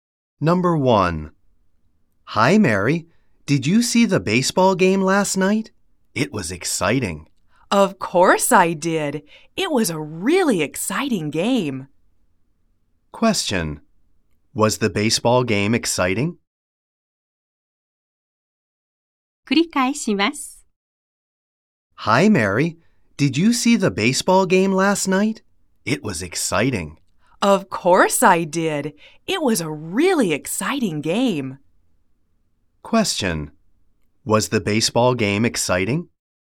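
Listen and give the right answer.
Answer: Yes, it was.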